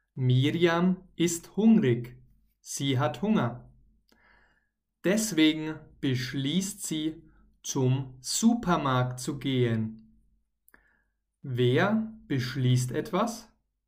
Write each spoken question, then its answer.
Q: Wer beschließt etwas?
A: Miriam. Miriam beschließt etwas.